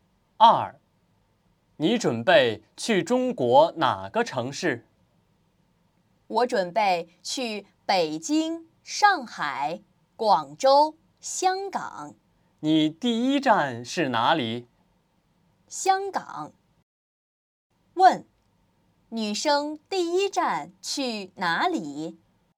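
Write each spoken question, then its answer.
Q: 女生第一站去哪里?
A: 香港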